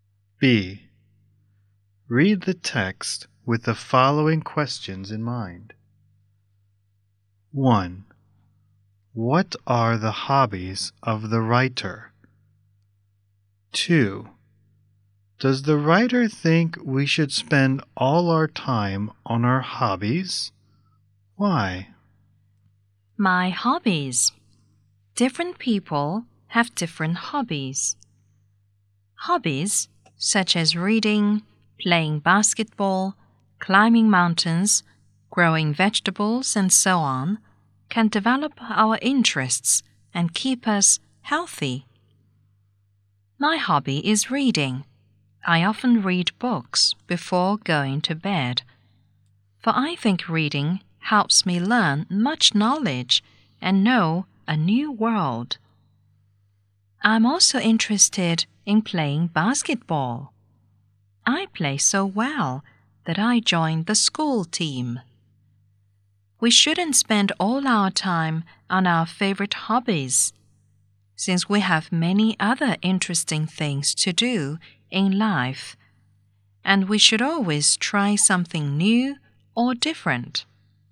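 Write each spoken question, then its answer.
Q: What are the hobbies of the writer?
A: Reading and playing basketball

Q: Does the writer think we should spend all our time on our hobbies?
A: No, because we have many other interesting things to do in life and should try something new or different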